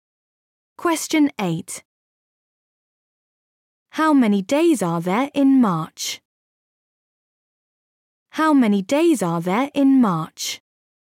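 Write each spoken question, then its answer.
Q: How many days are there in March?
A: 31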